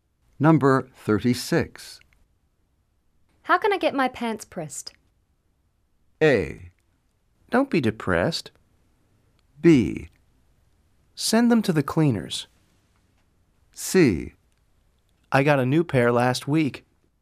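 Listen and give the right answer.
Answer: B: Send them to the cleaners.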